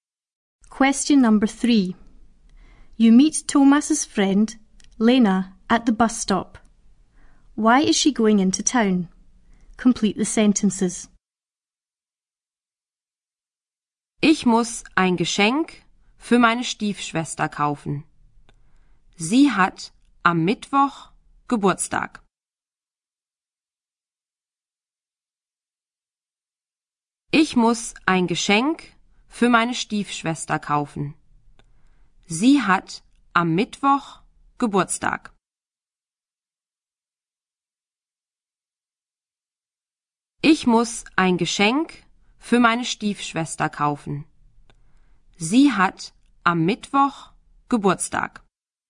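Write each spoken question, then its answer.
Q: Why is she going into town?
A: To buy a present for her stepsister, whose birthday is on Wednesday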